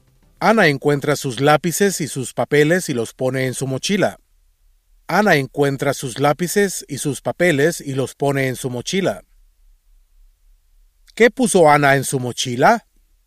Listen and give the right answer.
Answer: Ana puso sus lápices y sus papeles en su mochila.